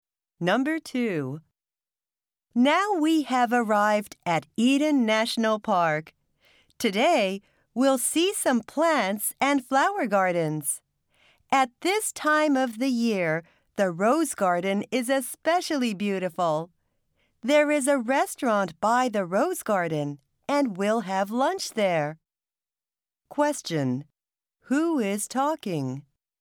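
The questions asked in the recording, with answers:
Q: Who is talking?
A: A tour guide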